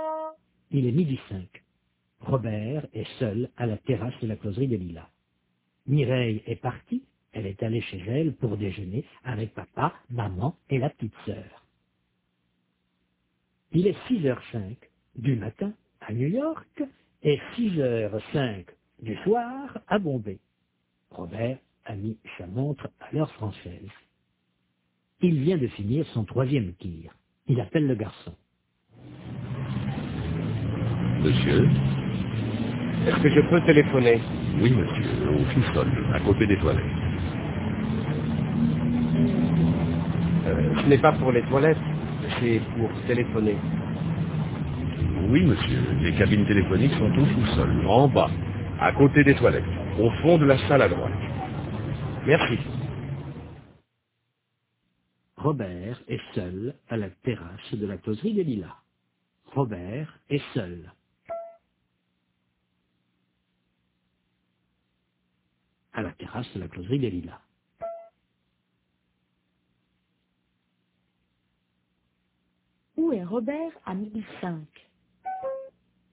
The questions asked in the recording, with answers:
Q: Où est Robert à 1005?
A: À la terrasse de la closerie des Lilas.